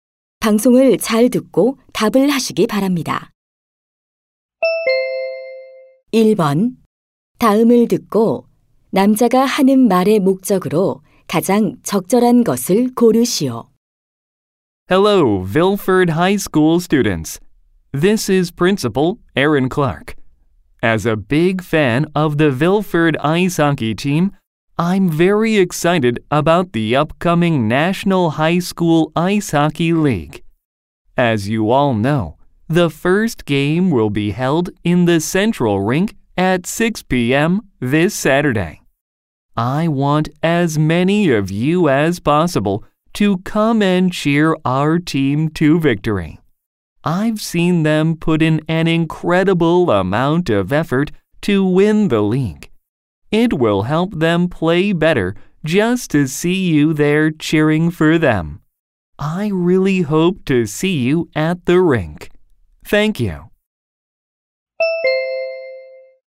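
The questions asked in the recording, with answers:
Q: 다음을 듣고 남자가 하는 말의 목적으로 가장 적절한 것을 고르시오.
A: 아이스하키 팀 경기에 와서 응원해 줄 것을 독려하려고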